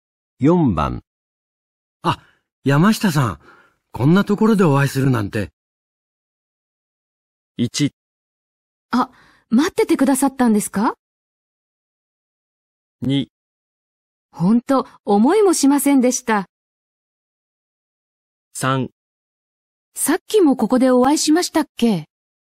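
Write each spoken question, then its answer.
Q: あ、山下さん、こんなところでお会いするなんて。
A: 2: ほんと、思いもしませんでした。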